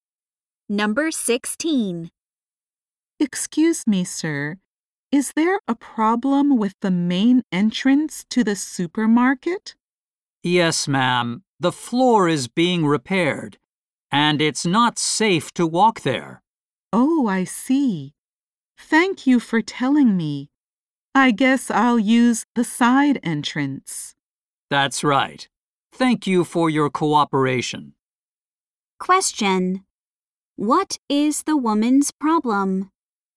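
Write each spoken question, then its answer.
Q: What is the woman's problem?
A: She can't use the main entrance because the floor is being repaired.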